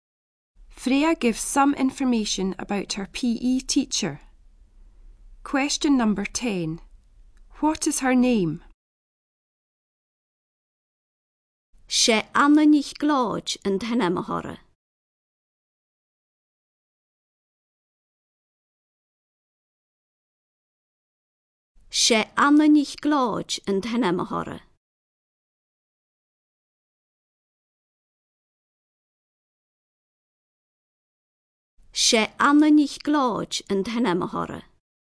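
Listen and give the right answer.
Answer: Anna MacLeod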